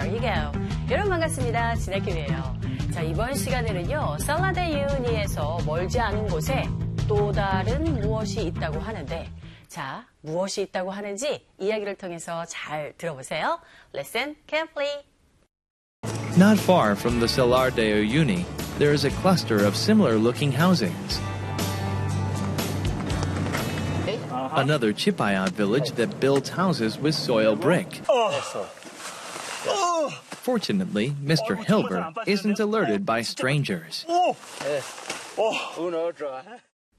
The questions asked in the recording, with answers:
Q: 살라데유니에서 멀지 않은 곳에 또 다른 무엇이 있다고 하는데, 자, 무엇이 있다고 하는지 이야기를 통해서 잘 들어보세요.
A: 바로 비슷하게 생긴 주택 단지들이 있다고 하죠.